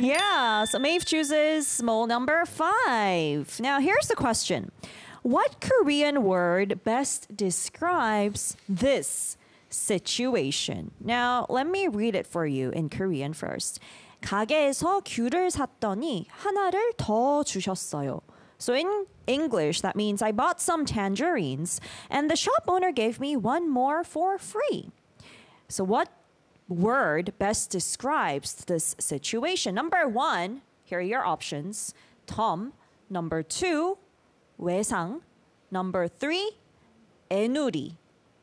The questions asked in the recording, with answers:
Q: So what word best describes this situation?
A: So the answer is Tom.